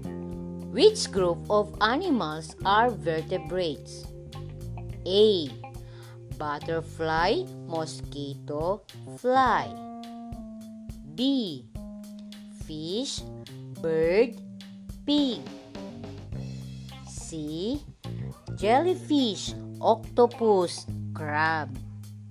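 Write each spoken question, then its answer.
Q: Which group of animals are vertebrates?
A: B: Fish, bird, pig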